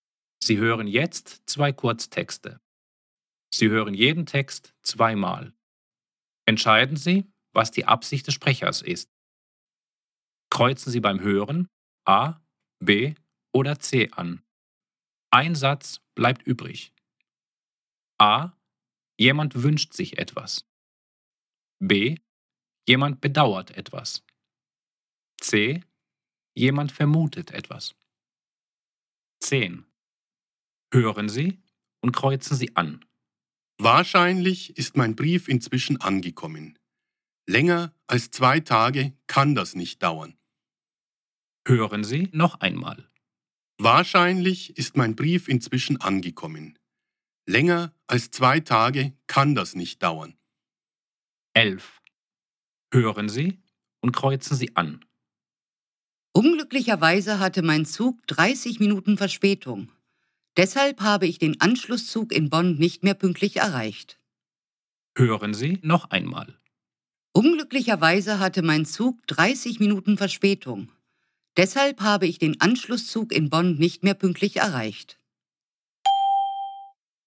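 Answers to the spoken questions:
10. C: Jemand vermutet etwas.
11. B: Jemand bedauert etwas.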